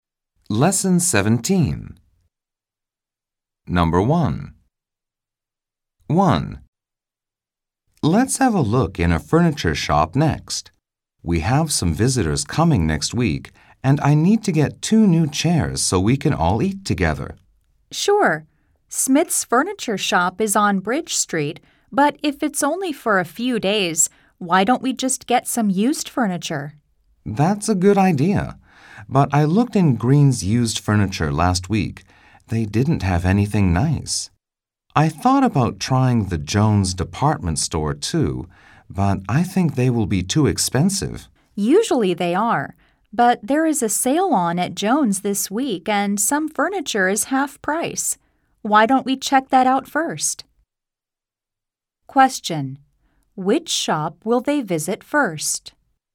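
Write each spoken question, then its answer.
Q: Which shop will they visit first?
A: Jones department store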